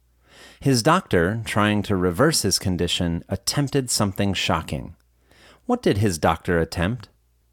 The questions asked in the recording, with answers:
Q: What did his doctor attempt?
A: His doctor attempted something shocking.